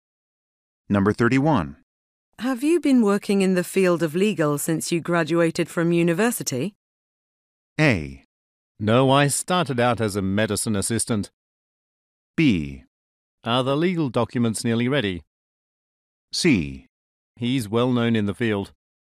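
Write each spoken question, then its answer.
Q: Have you been working in the field of legal since you graduated from university?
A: A: No, I started out as a medicine assistant.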